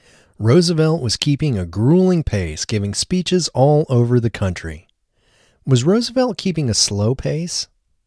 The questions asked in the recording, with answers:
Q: Was Roosevelt keeping a slow pace?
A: No, Roosevelt wasn't keeping a slow pace.